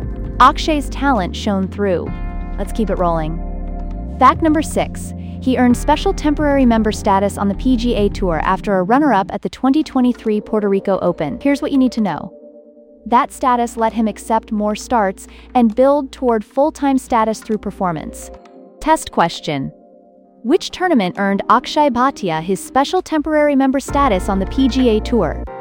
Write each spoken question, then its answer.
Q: Which tournament earned Akshay Bhatia his special temporary member status on the PGA Tour?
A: Correct answer, Puerto Rico Open.